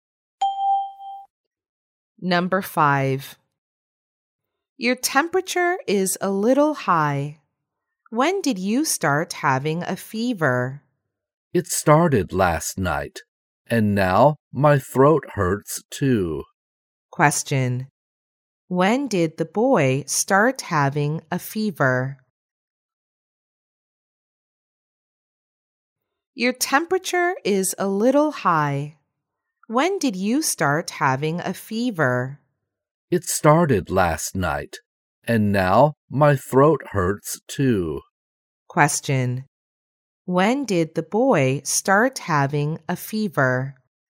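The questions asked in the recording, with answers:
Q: When did the boy start having a fever?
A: Last night.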